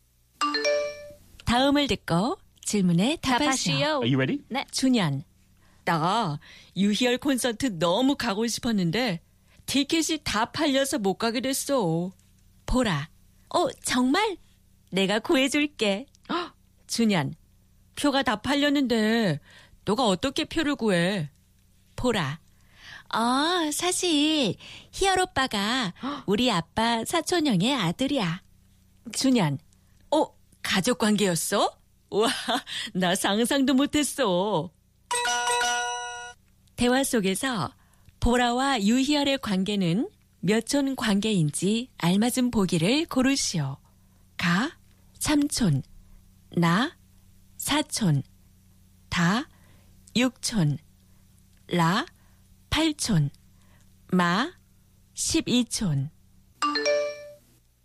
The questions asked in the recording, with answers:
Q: 대화 속에서 보라와 유희열의 관계는 몇촌 관계인지 알맞은 보기를 고르시오.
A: Ta, yukchon, 6 degrees of kinship.